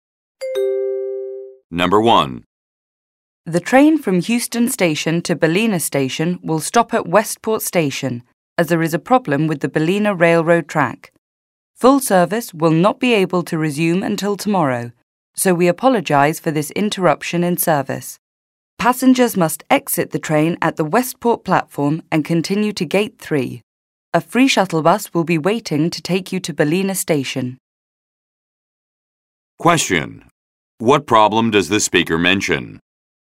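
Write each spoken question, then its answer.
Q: What problem does the speaker mention?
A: There is a problem with the Ballina railroad track, so the train will stop at Westport.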